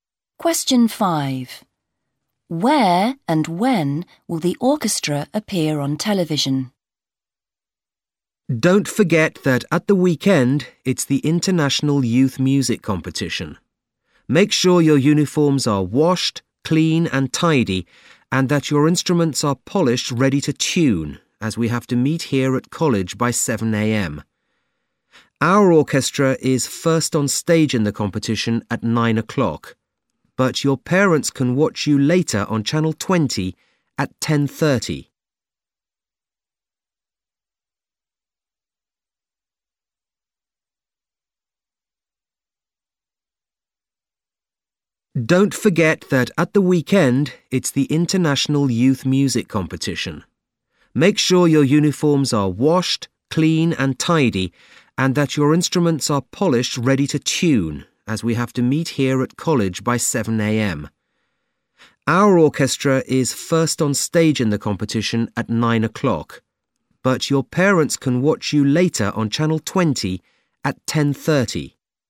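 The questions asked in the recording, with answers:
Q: Where and when will the orchestra appear on television?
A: On Channel 20 at 10:30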